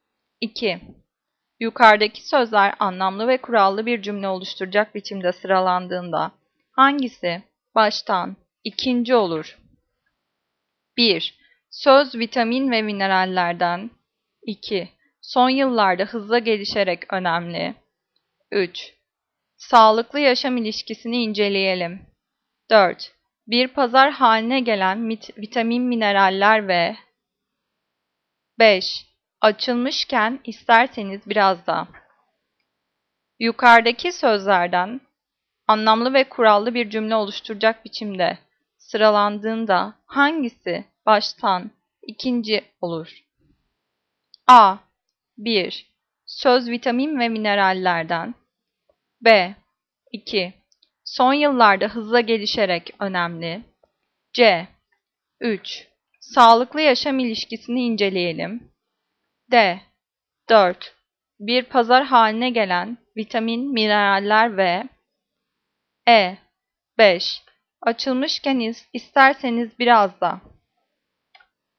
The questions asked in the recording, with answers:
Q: Yukarıdaki sözler anlamlı ve kurallı bir cümle oluşturacak biçimde sıralandığında hangisi baştan ikinci olur?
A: Cevap E. 5. Açılmışken isterseniz biraz da.